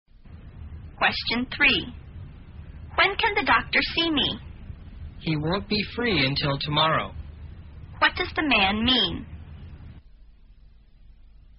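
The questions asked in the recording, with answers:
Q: What does the man mean?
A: The doctor can't see the speaker until tomorrow.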